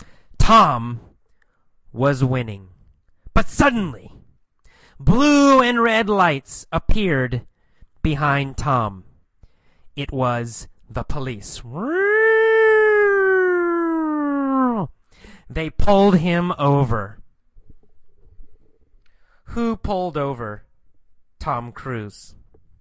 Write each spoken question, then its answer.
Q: Who pulled over Tom Cruise?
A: Well, the police. The police pulled over Tom Cruise.